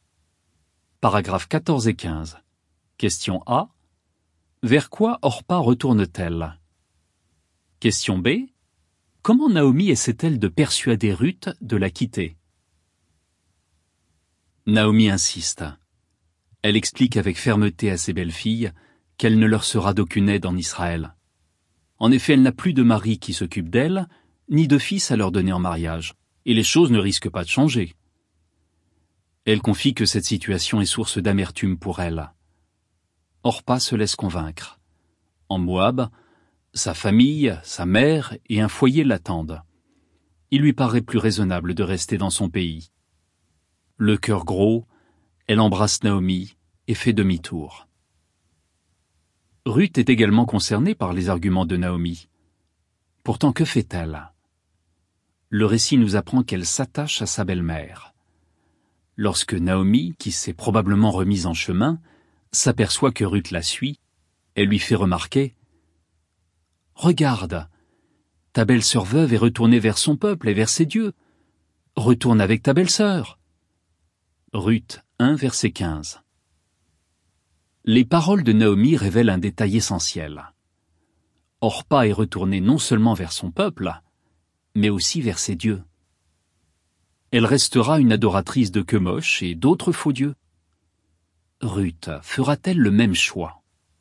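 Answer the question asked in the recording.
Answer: Vers son peuple et vers ses dieux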